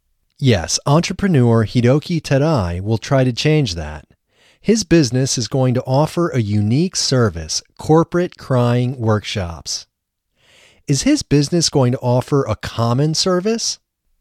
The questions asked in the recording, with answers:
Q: Is his business going to offer a common service?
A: No, his business isn't going to offer a common service.